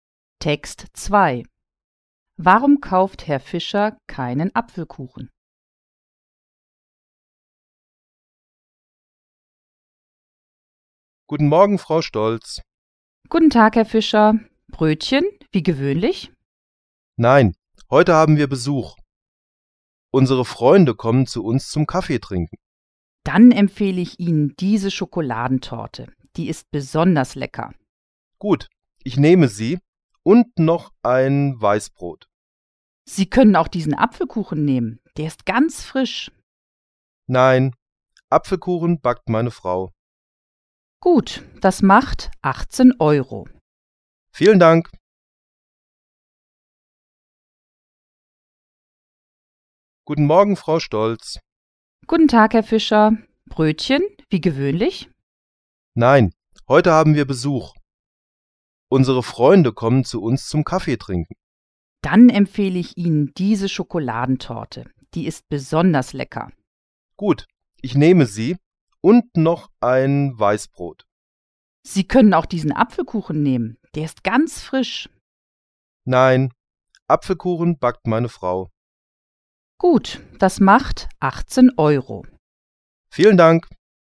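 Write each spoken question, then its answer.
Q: Warum kauft Herr Fischer keinen Apfelkuchen?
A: Seine Frau backt Apfelkuchen selbst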